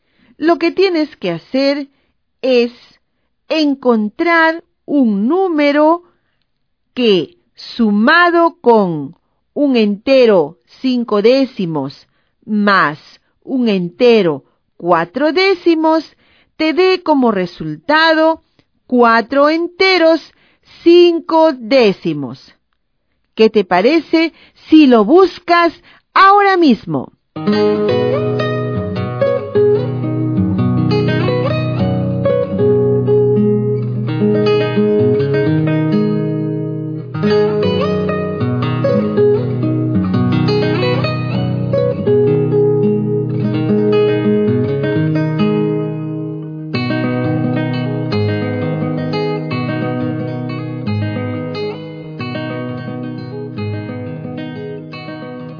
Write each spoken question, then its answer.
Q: Lo que tienes que hacer es encontrar un número que, sumado con 1 entero 5 décimos más 1 entero 4 décimos, te dé como resultado 4 enteros 5 décimos.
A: el número que corresponde en la casilla es 1 entero 6 décimos.